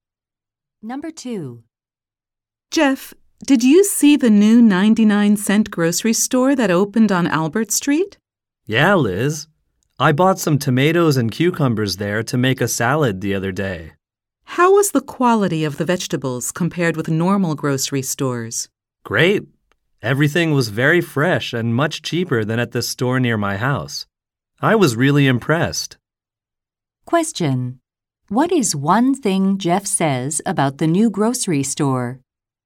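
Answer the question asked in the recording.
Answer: Its vegetables are fresh and cheaper.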